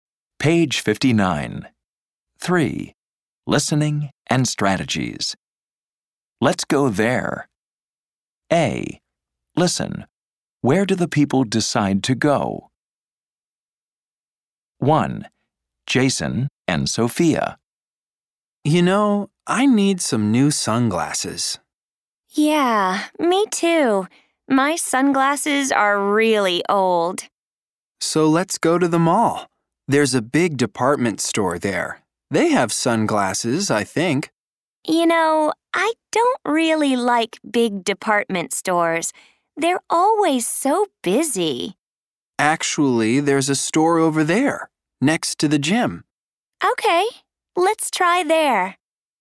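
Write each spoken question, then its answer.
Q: Where do the people decide to go?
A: a store next to the gym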